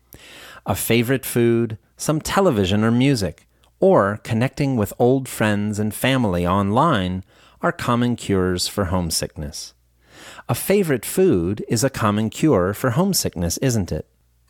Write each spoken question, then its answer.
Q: A favorite food is a common cure for homesickness, isn't it?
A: Yes, it is. A favorite food is a common cure for homesickness.